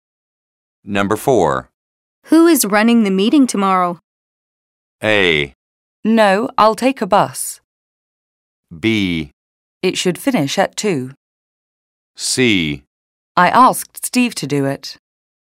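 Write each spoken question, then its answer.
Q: Who is running the meeting tomorrow?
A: C: I asked Steve to do it.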